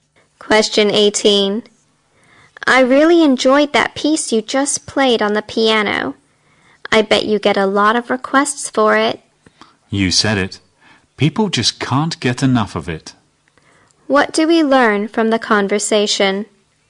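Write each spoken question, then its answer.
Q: What do we learn from the conversation?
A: The piano piece is very popular.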